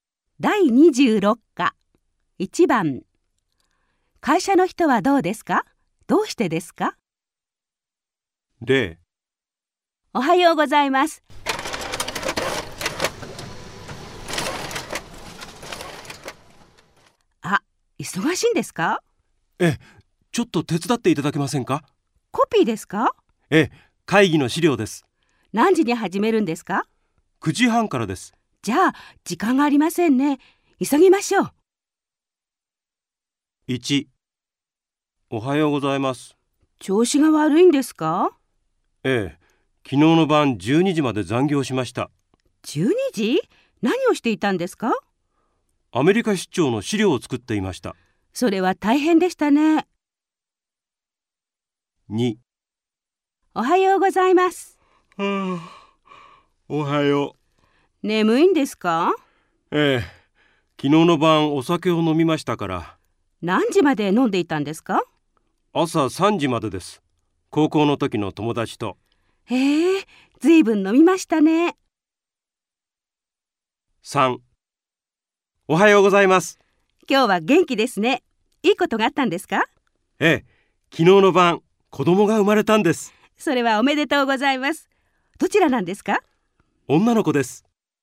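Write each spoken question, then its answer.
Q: 会社の人はどうですか?どうしてですか?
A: 調子が悪い。昨日の晩12時までアメリカ出張の資料を作って残業したから。

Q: 会社の人はどうですか?どうしてですか?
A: 眠い。昨日の晩、朝3時まで高校の時の友達とお酒を飲んだから。

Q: 会社の人はどうですか?どうしてですか?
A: 元気。昨日の晩、子供(女の子)が生まれたから。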